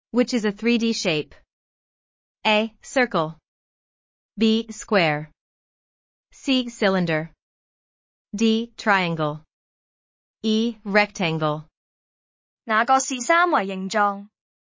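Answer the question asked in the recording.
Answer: C: Cylinder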